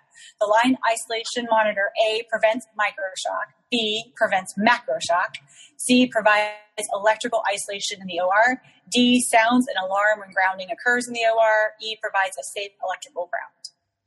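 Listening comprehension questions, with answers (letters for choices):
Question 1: Line isolation monitor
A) Prevents microshock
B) Prevents macroshock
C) Provides electrical isolation in OR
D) Sounds alarm when grounding occurs in OR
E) Provides safe electrical ground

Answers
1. D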